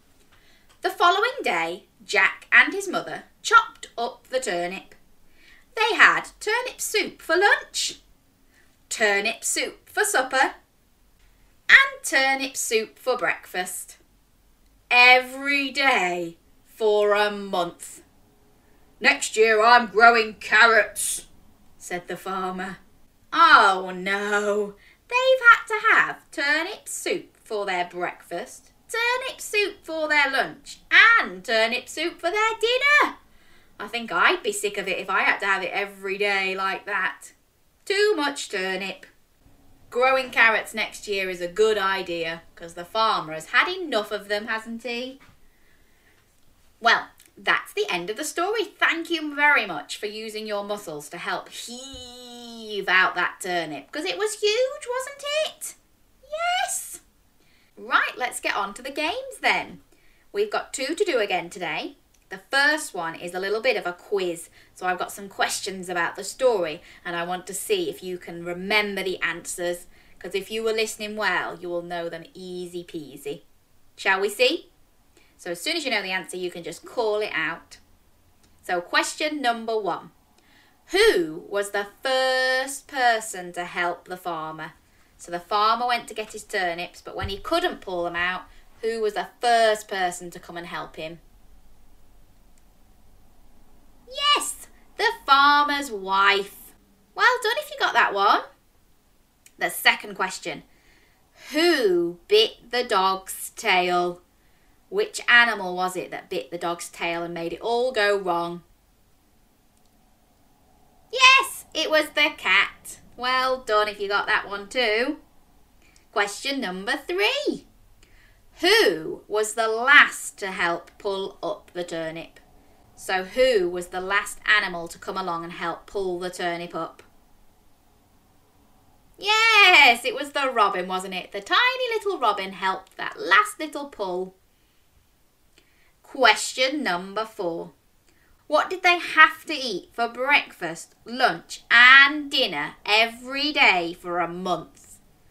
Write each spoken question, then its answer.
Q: What did they have to eat for breakfast, lunch and dinner every day for a month?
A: That's right, turnip soup.